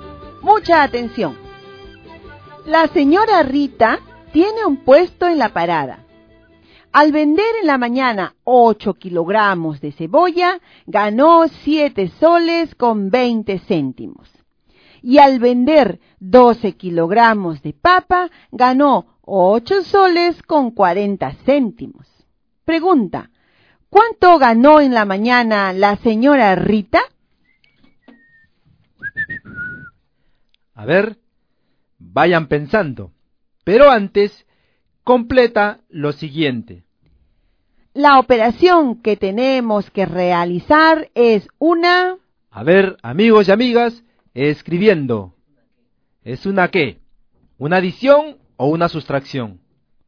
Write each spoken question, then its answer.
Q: Pregunta, ¿cuánto ganó en la mañana la señora Rita?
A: 15,60 céntimos.

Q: ¿Es una qué? ¿Una adición o una sustracción?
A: La operación que deben realizar es adición o suma.